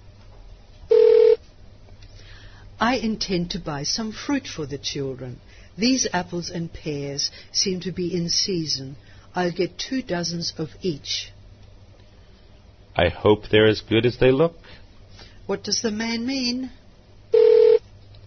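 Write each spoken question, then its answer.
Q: What does the man mean?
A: He will buy two dozen apples and two dozen pears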